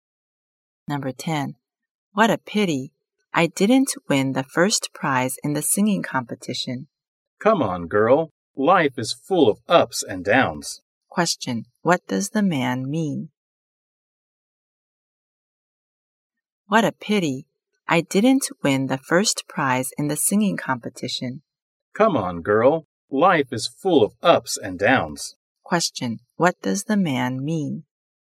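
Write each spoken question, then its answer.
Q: Question. What does the man mean?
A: Life has ups and downs, so she shouldn't be too sad about losing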